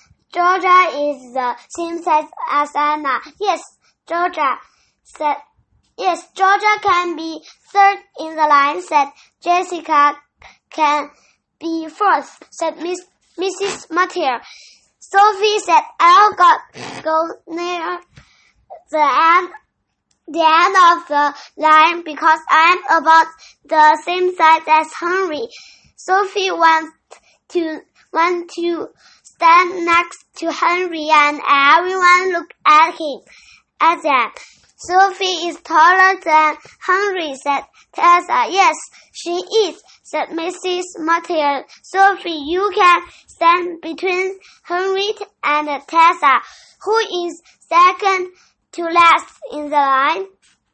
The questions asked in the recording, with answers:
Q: Who is second to last in the line?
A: Sophie is second to last in the line.